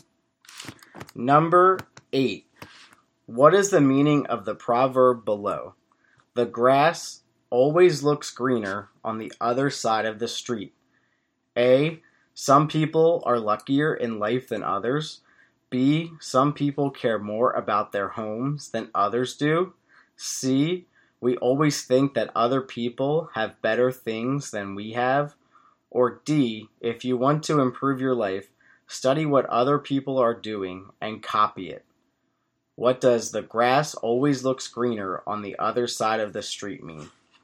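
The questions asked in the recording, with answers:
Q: What is the meaning of the proverb below?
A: C: We always think that other people have better things than we have.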